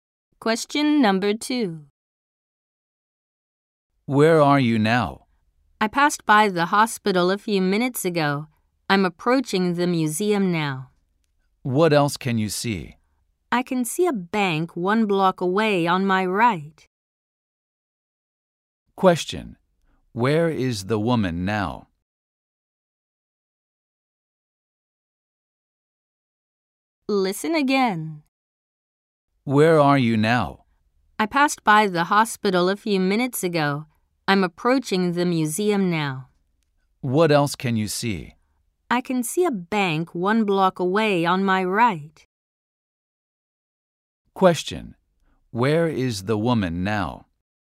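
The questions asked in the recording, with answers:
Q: Where is the woman now?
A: Near the museum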